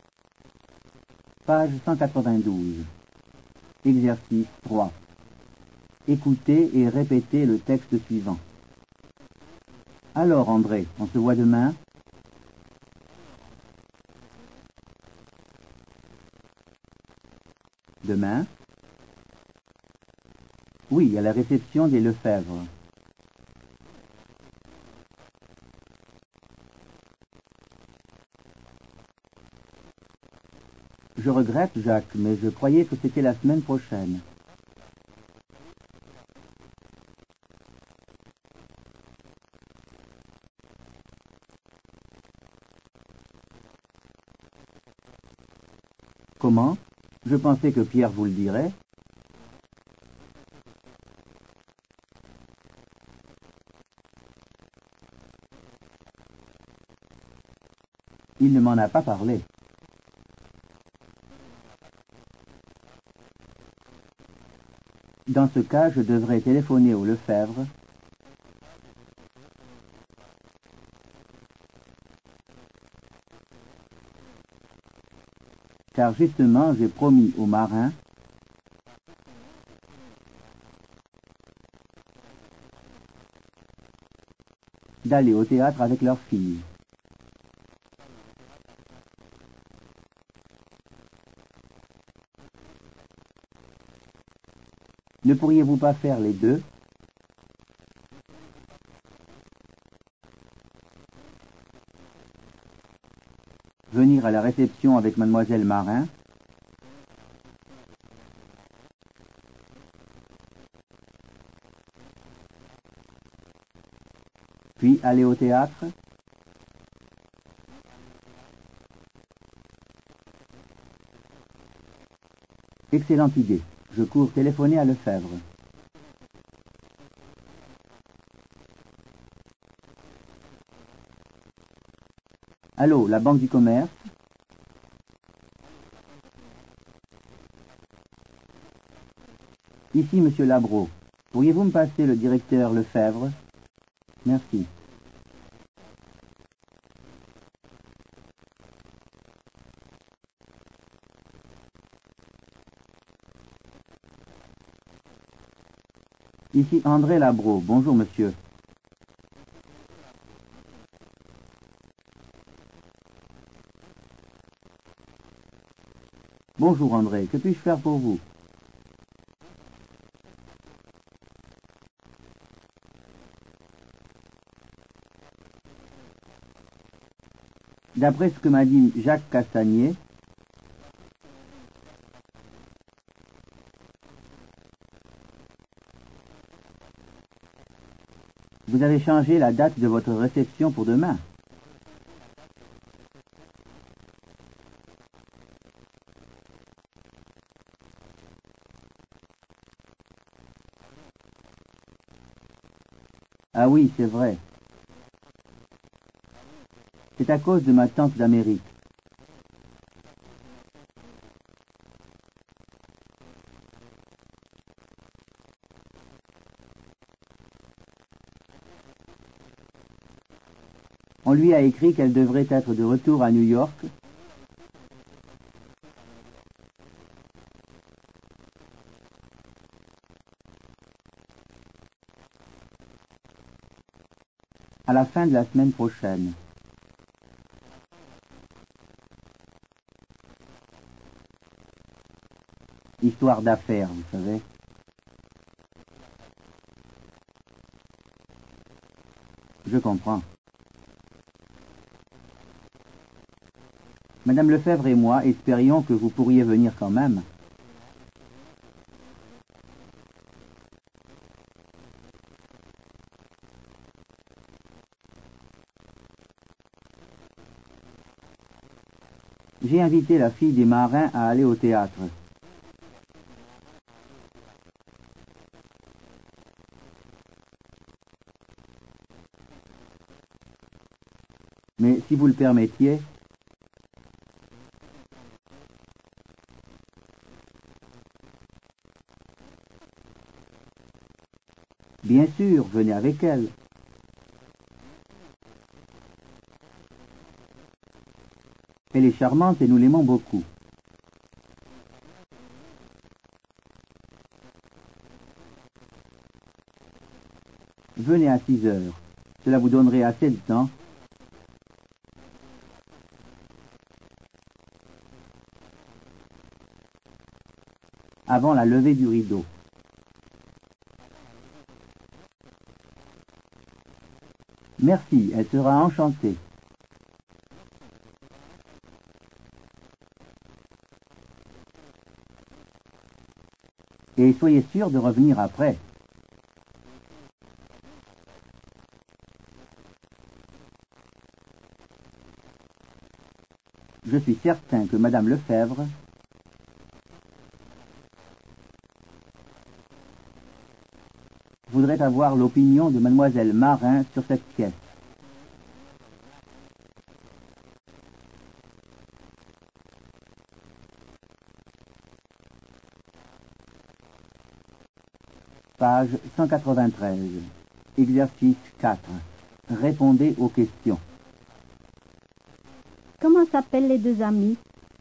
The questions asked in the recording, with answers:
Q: Comment s'appellent les deux amis?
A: Les deux amis s'appellent Jacques et André.